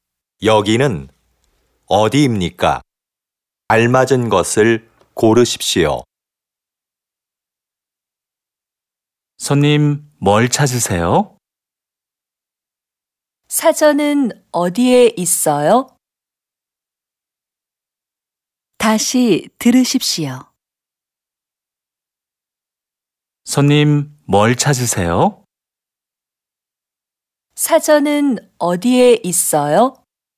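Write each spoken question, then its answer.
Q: 여기는 어디입니까?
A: 서점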